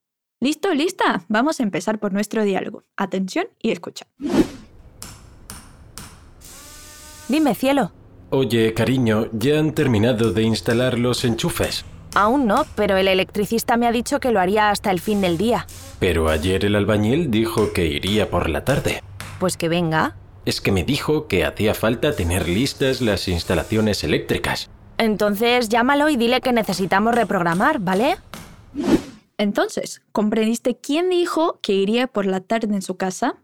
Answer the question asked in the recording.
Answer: pero ayer el albañil dijo que iría por la tarde.